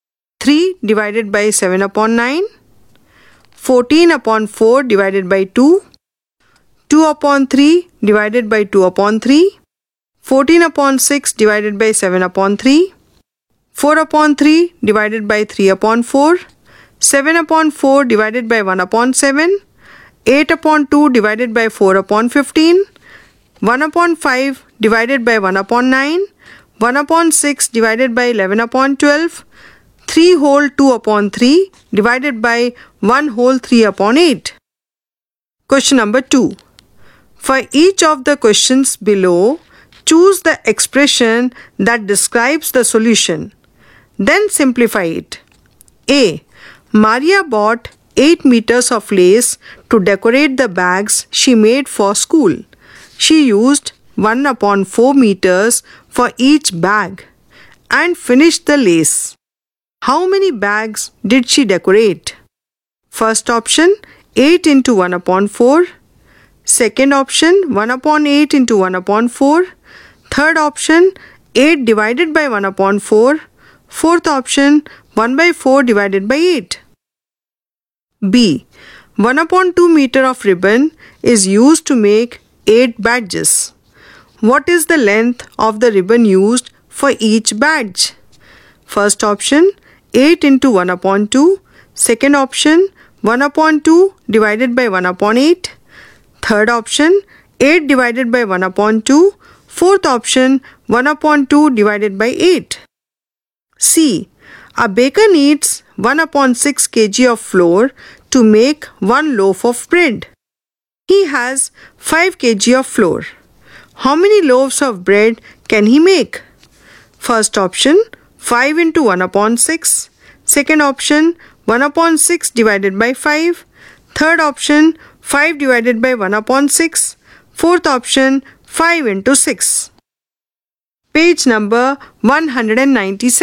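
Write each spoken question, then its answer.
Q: How many bags did she decorate?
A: Third option: 8 divided by 1 upon 4 (32 bags)

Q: What is the length of the ribbon used for each badge?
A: Fourth option: 1 upon 2 divided by 8 (1 upon 16 meter)

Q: How many loaves of bread can he make?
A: Third option: 5 divided by 1 upon 6 (30 loaves)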